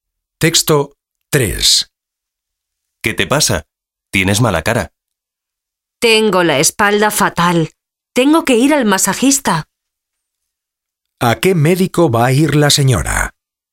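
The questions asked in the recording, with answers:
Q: ¿A qué médico va a ir la señora?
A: Al masajista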